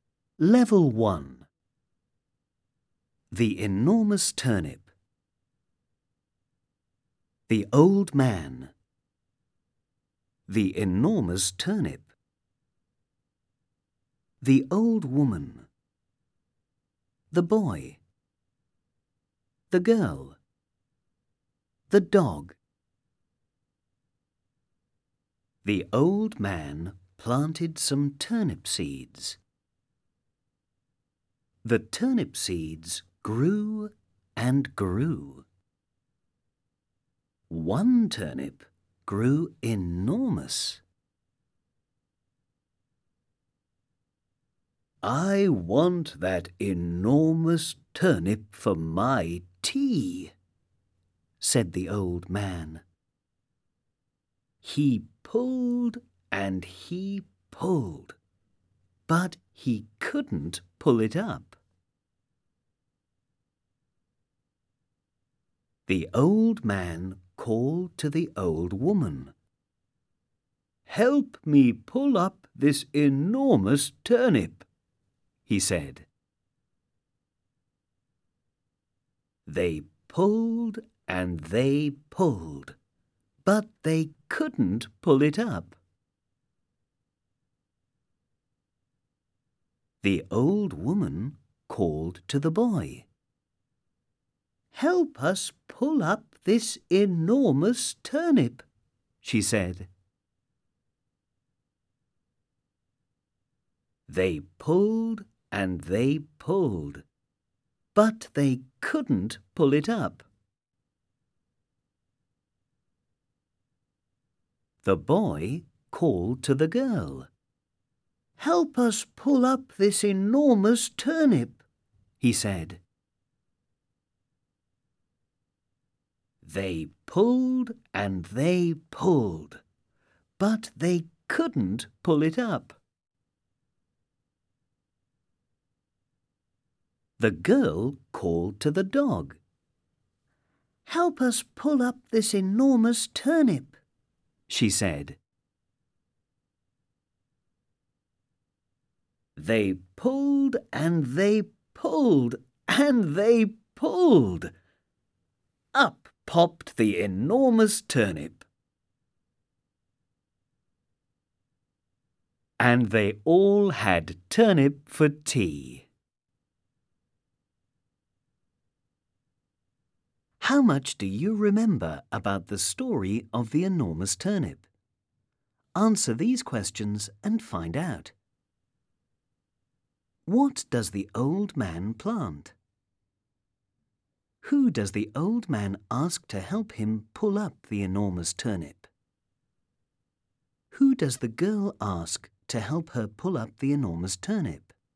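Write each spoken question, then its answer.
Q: What does the old man plant?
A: Some turnip seeds

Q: Who does the old man ask to help him pull up the enormous turnip?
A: The old woman

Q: Who does the girl ask to help her pull up the enormous turnip?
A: The dog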